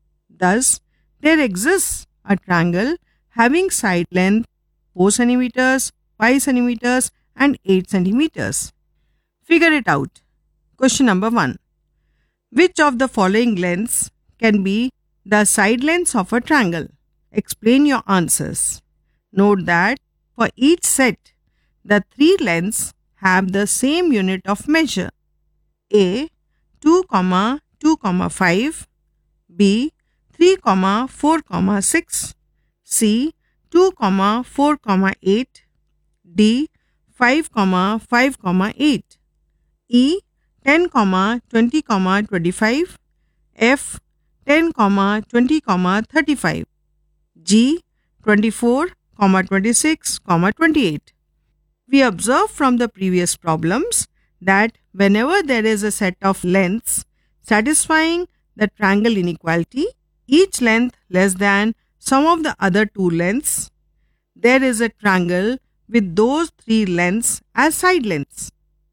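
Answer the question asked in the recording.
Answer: B: 3, 4, 6; D: 5, 5, 8; E: 10, 20, 25; G: 24, 26, 28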